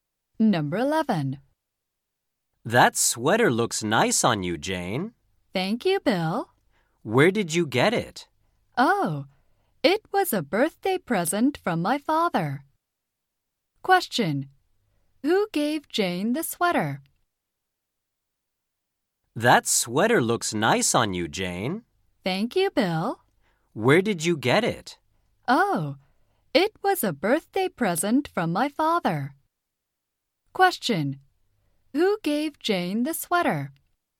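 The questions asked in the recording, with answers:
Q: Who gave Jane the sweater?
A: Her father.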